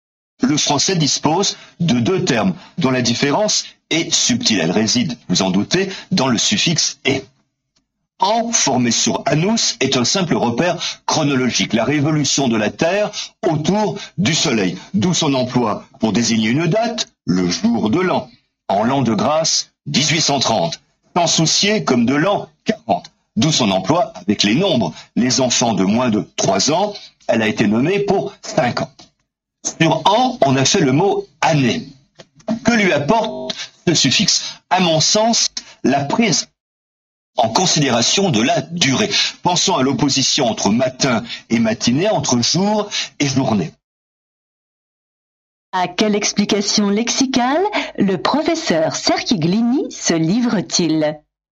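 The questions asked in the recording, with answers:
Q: À quelle explication lexicale le professeur Cerchiglini se livre-t-il ?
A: Il explique la différence entre « an » et « année » : « an » est un simple repère chronologique, et le suffixe « -ée » d'« année » ajoute l'idée de durée.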